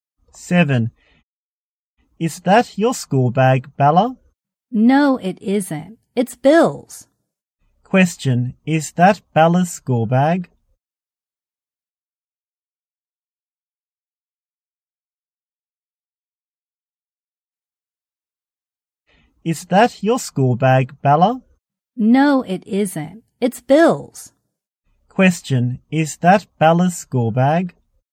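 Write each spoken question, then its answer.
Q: Is that Bella's school bag?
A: No, it isn't. It's Bill's.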